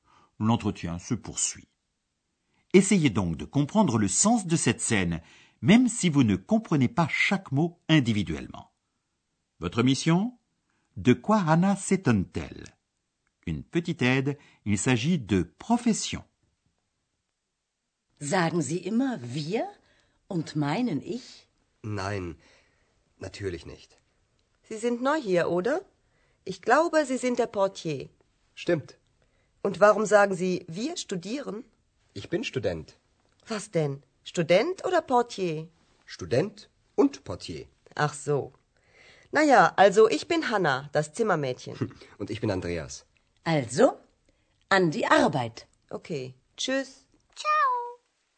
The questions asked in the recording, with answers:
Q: De quoi Anna s'étonne-t-elle ?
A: Anna s'étonne qu'Andreas affirme être étudiant, alors qu'il lui a déclaré auparavant être le portier de l'hôtel.